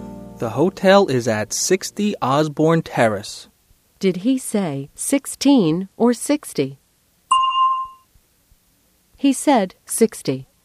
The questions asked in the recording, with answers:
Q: Did he say 16 or 60?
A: He said 60.